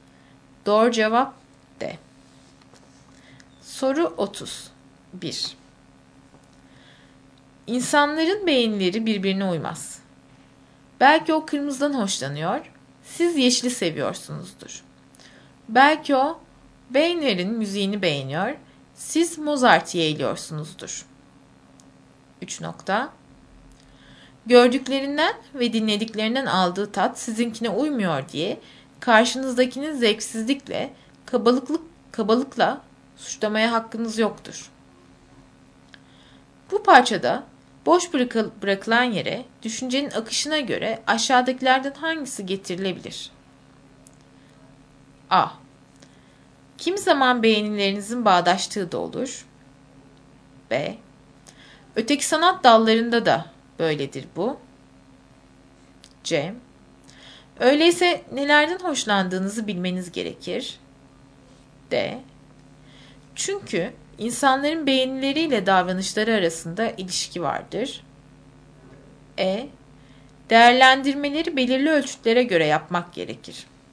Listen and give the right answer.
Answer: Doğru cevap B.